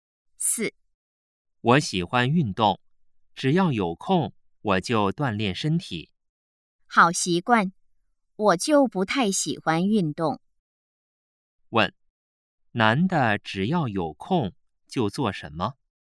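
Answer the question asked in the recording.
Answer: 锻炼身体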